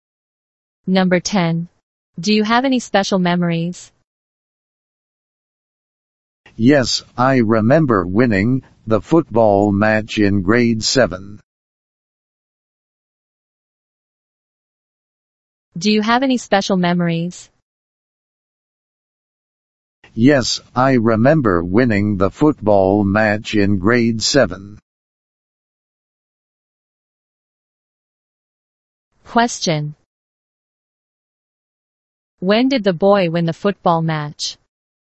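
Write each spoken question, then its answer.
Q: When did the boy win the football match?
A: In grade 7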